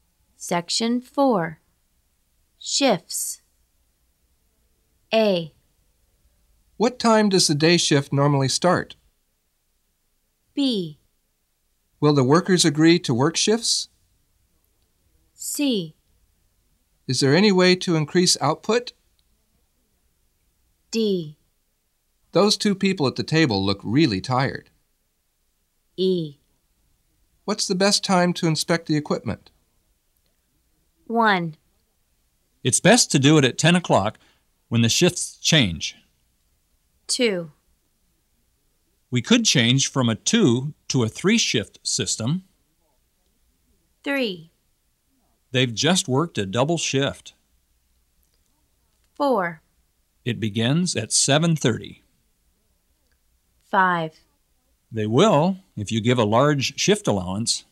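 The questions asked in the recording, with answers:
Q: It's best to do it at 10 o'clock when the shifts change.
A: E: What's the best time to inspect the equipment?

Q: We could change from a 2 to a 3 shift system.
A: C: Is there any way to increase output?

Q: They've just worked a double shift.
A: D: Those two people at the table look really tired.

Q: It begins at 7:30.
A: A: What time does the day shift normally start?

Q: They will, if you give a large shift allowance.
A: B: Will the workers agree to work shifts?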